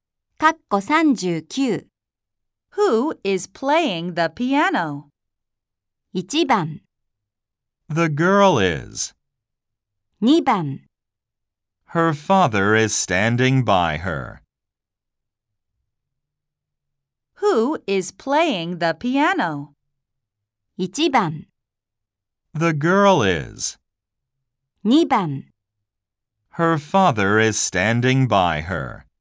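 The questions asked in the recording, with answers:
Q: Who is playing the piano?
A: 1: The girl is.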